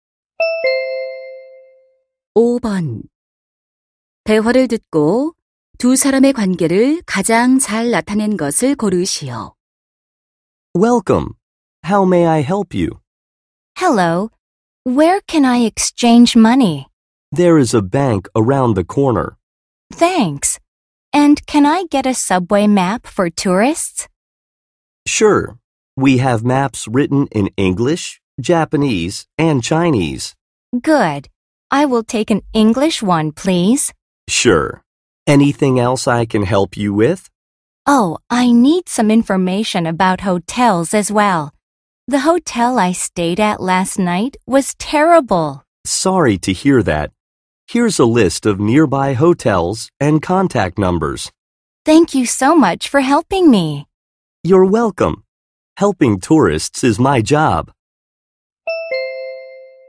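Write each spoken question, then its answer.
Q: 대화를 듣고 두 사람의 관계를 가장 잘 나타낸 것을 고르시오.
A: 관광 안내소 직원 - 관광객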